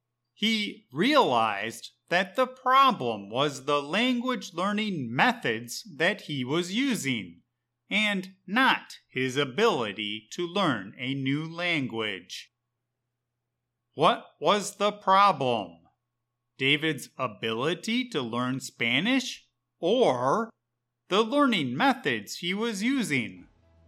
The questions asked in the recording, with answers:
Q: What was the problem? David's ability to learn Spanish or the learning methods he was using?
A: The problem was that David was using the wrong learning methods.